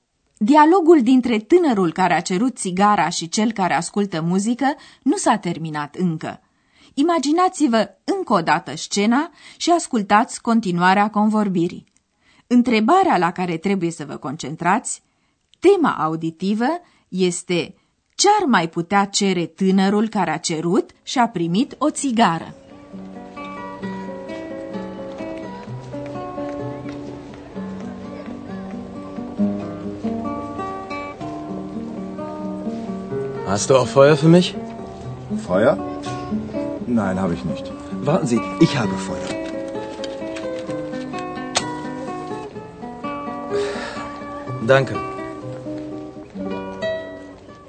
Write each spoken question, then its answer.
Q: ce ar mai putea cere tânărul care a cerut și a primit o țigară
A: Cine vrea să fumeze o țigară are nevoie și de foc.